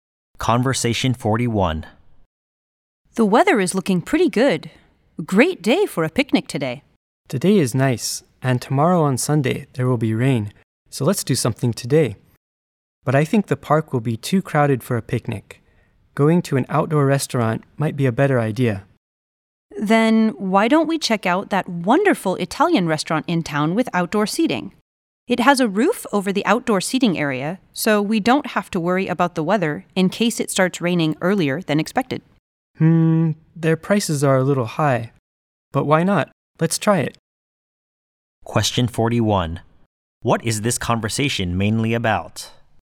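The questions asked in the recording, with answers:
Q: What is this conversation mainly about?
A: Deciding what to do today (going to an outdoor Italian restaurant instead of a picnic)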